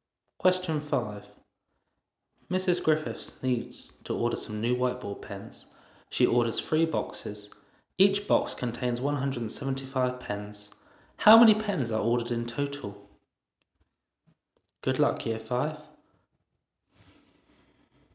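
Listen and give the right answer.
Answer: 525 pens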